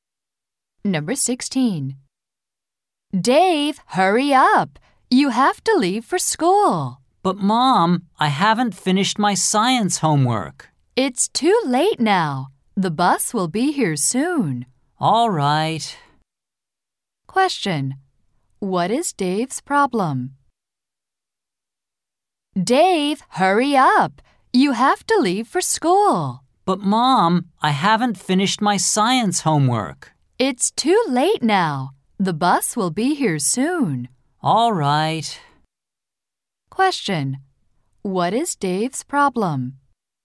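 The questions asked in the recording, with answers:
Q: What is Dave's problem?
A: He hasn't finished his science homework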